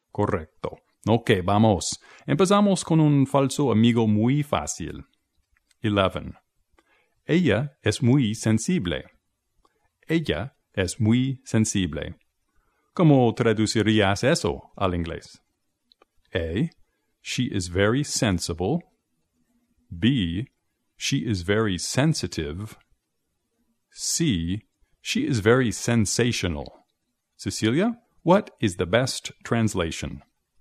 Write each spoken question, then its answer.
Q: Ella es muy sensible. ¿Cómo traducirías eso al inglés?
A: La respuesta correcta sería B.